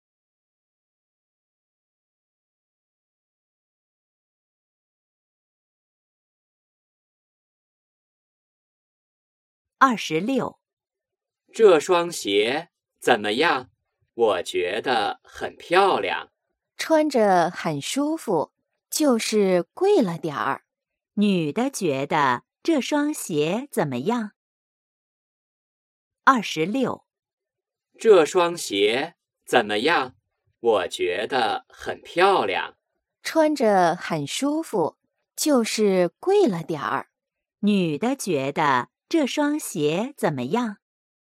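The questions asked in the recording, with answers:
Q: 女的觉得这双鞋怎么样?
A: 很舒服,但有点儿贵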